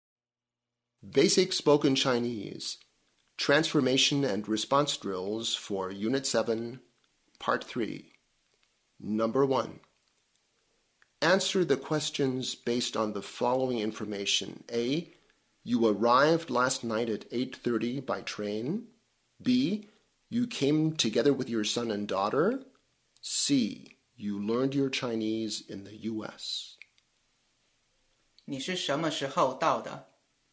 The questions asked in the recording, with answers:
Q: 你是什么时候到的?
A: 我是昨天晚上到的。